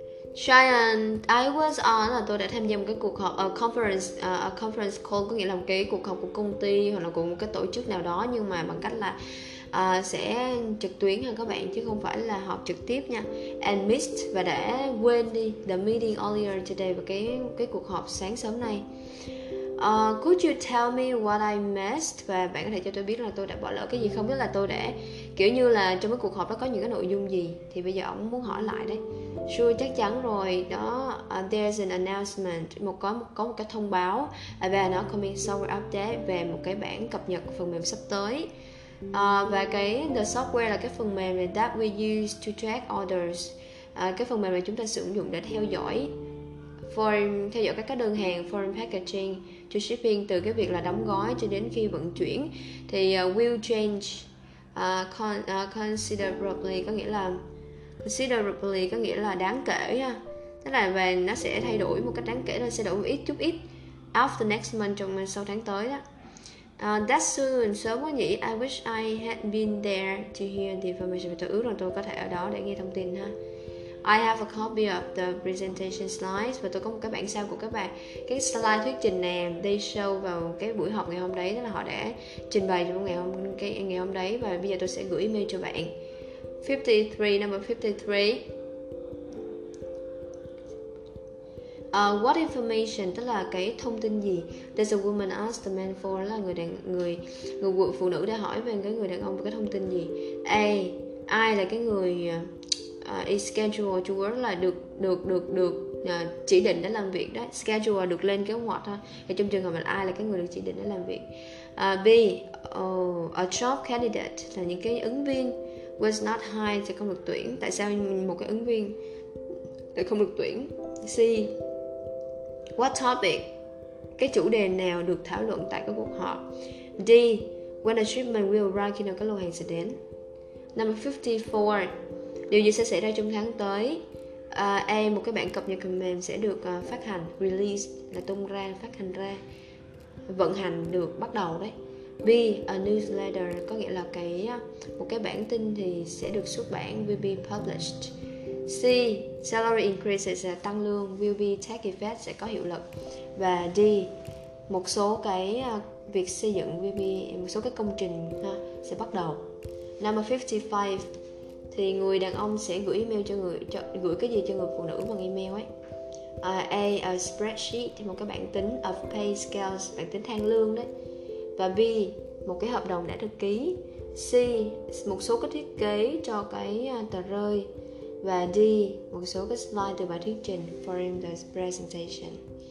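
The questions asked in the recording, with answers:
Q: 53, what information, tức là cái thông tin gì?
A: C: chủ đề nào được thảo luận tại cuộc họp

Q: Number 54, điều gì sẽ xảy ra trong tháng tới.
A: A: một bản cập nhật phần mềm sẽ được phát hành

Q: Number 55, thì người đàn ông sẽ gửi email cho người cho, gửi cái gì cho người phụ nữ bằng email ấy.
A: D: một số slide từ bài thuyết trình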